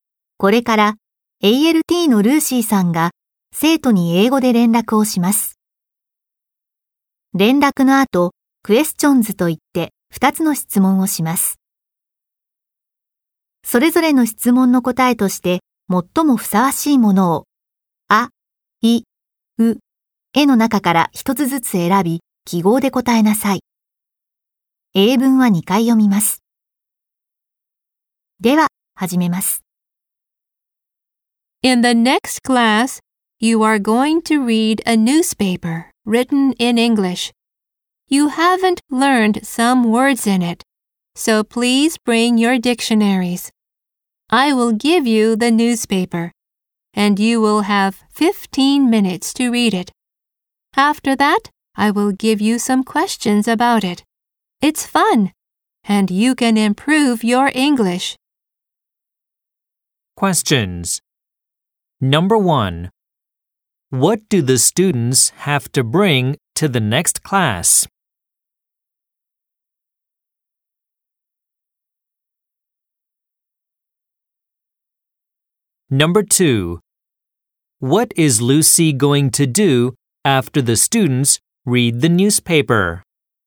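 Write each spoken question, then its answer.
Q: What do the students have to bring to the next class?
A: Their dictionaries.

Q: What is Lucy going to do?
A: She will give the students some questions about the newspaper.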